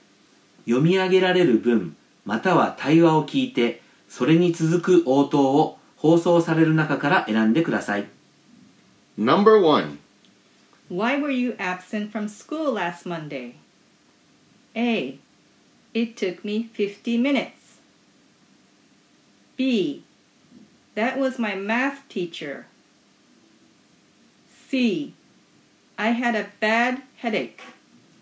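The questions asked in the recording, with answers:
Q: Why were you absent from school last Monday?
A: C: I had a bad headache.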